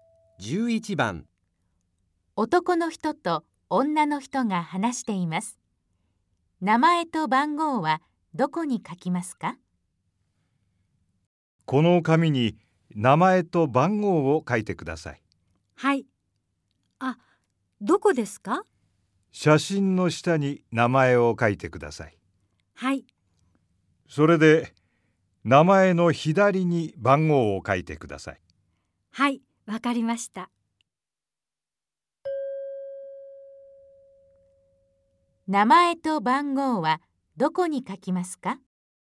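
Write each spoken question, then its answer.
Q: 名前と番号はどこに書きますか?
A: 名前は写真の下、番号は名前の左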